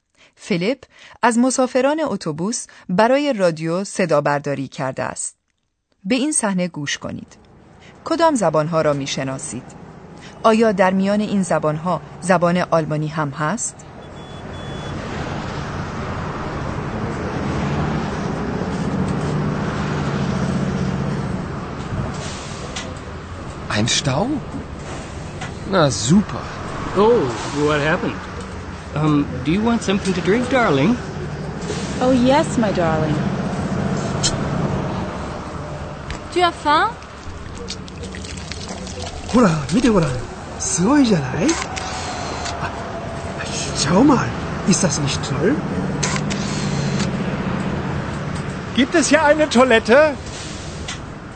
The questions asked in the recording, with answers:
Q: کدام زبانها را می شناسید؟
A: آیا توانستید زبانهای فرانسه و انگلیسی را تشخیص دهید؟ زبان ژاپنی را چطور؟

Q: آیا در میان این زبانها زبان آلمانی هم هست؟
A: شاید صحبت آلمانی زبانها را فهمیده باشید یکی میپرسد که آیا آنجا توالت هم وجود دارد؟